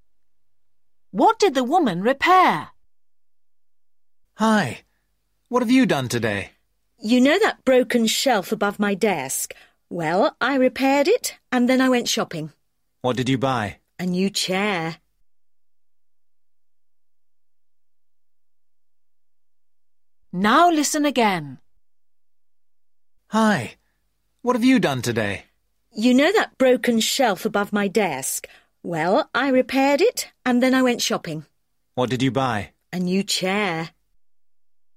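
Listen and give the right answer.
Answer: a shelf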